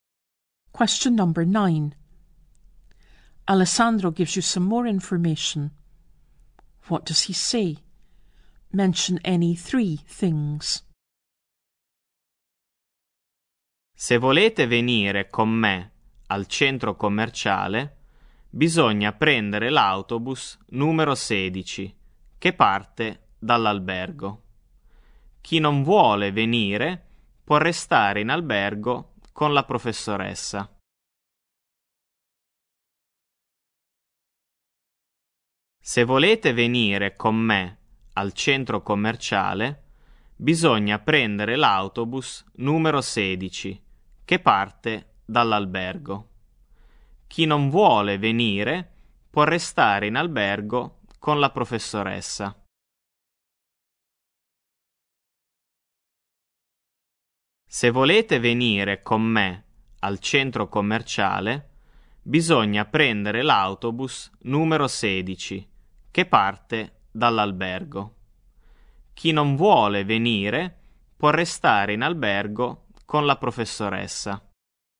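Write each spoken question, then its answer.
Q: What does he say? Mention any 3 things.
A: To go to the shopping centre, take bus number 16, which leaves from the hotel; anyone who doesn't want to go can stay at the hotel with the teacher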